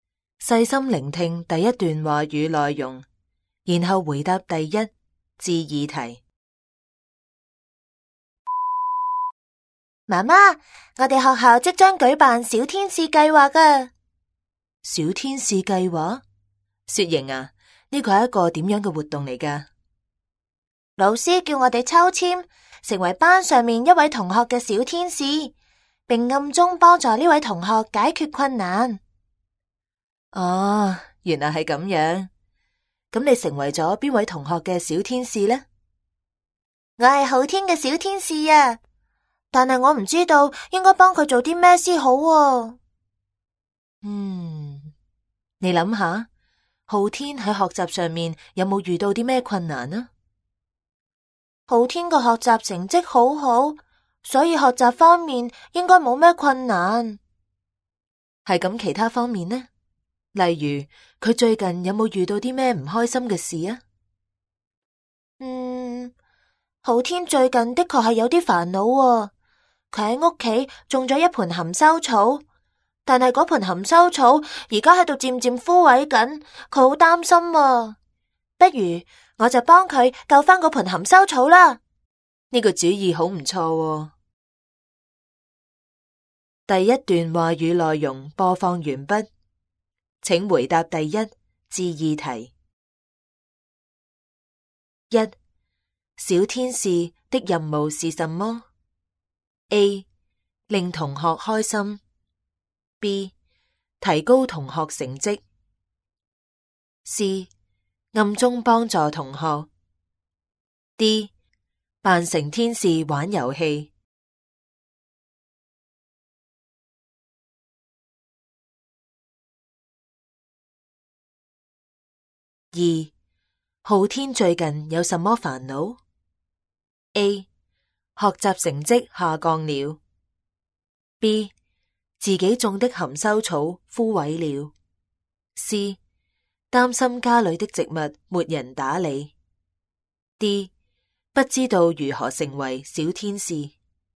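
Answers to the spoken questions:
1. C: 暗中帮助同学。
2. B: 自己种的含羞草枯萎了。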